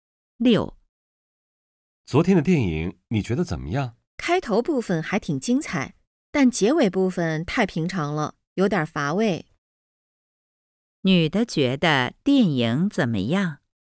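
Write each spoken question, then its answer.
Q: 女的觉得电影怎么样?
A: 开头挺精彩,结尾太平常,有点乏味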